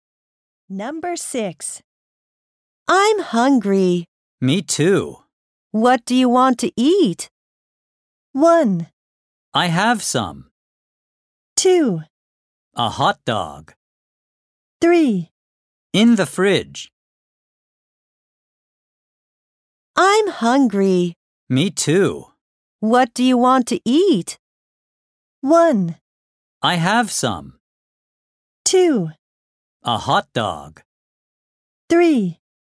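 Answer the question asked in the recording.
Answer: 2: A hot dog.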